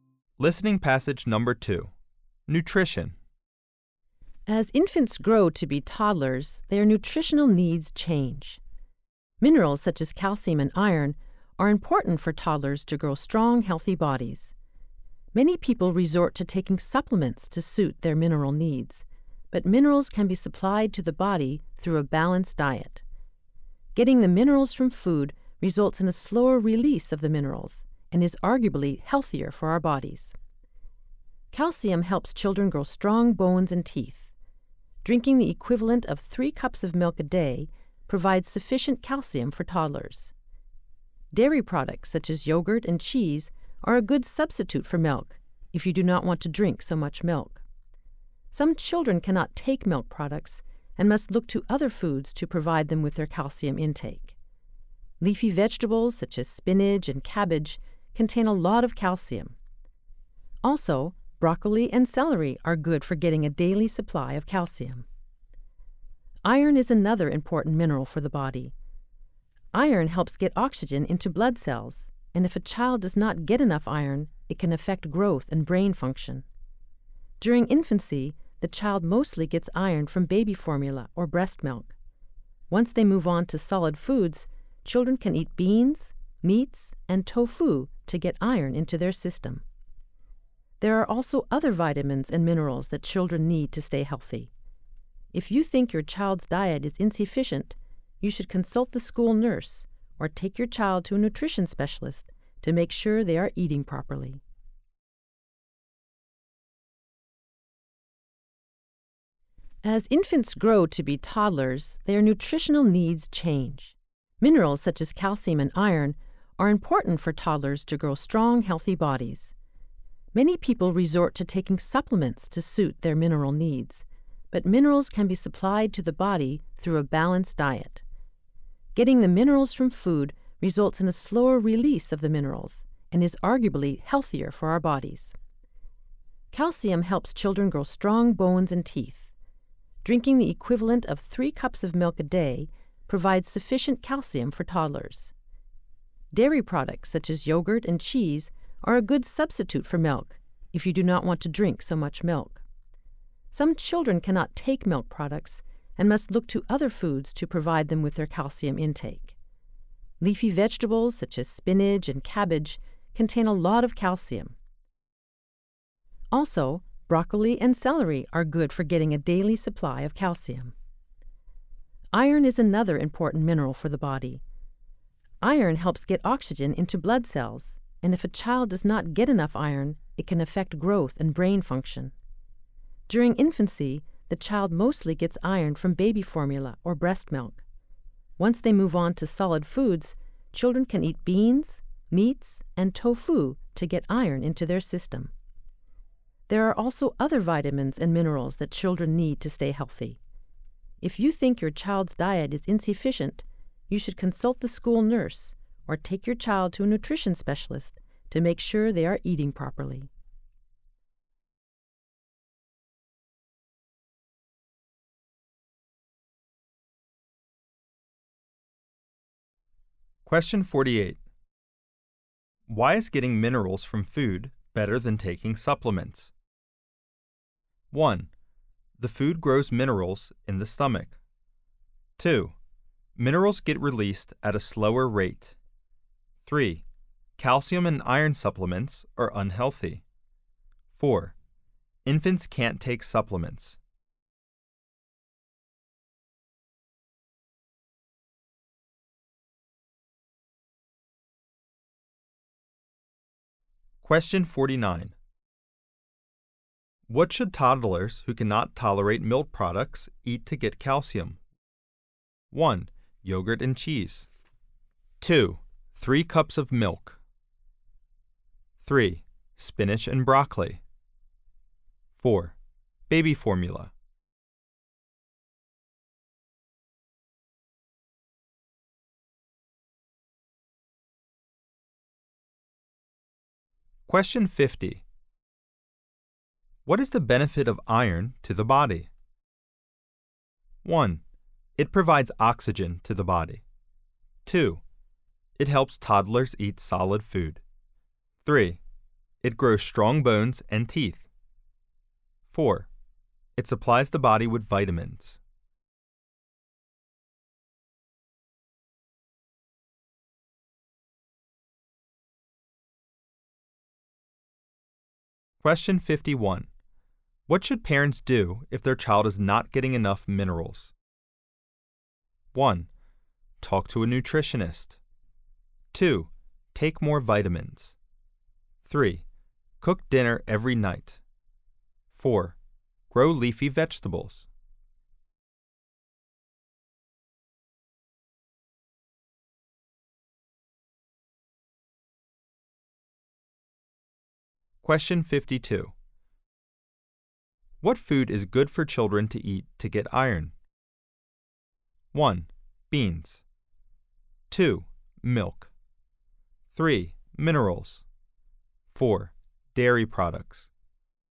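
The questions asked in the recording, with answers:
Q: Why is getting minerals from food better than taking supplements?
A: 2: Minerals get released at a slower rate.

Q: What should toddlers who cannot tolerate milk products eat to get calcium?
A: 3: Spinach and broccoli.

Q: What is the benefit of iron to the body?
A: 1: It provides oxygen to the body.

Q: What should parents do if their child is not getting enough minerals?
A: 1: Talk to a nutritionist.

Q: What food is good for children to eat to get iron?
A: 1: Beans.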